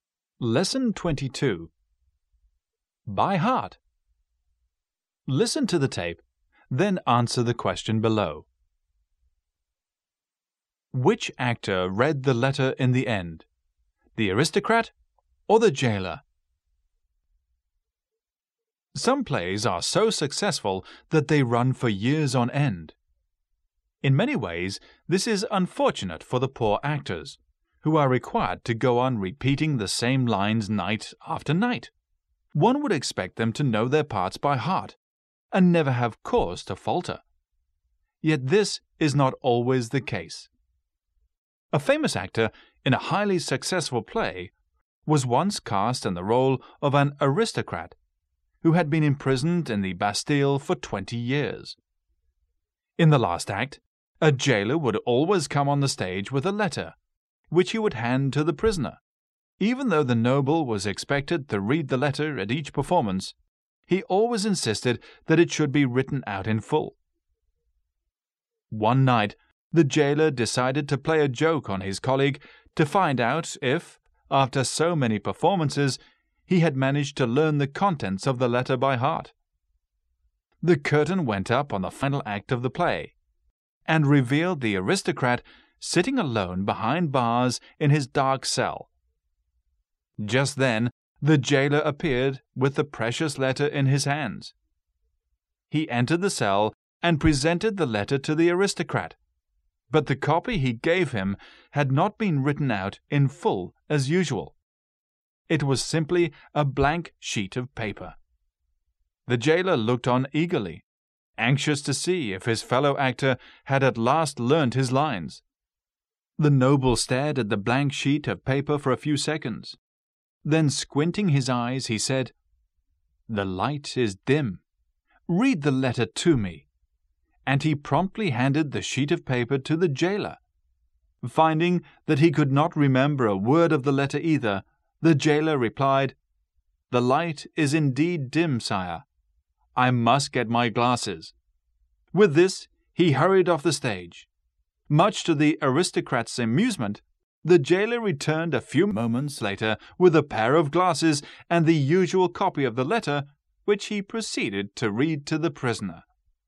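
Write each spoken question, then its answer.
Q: Which actor read the letter in the end?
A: The jailer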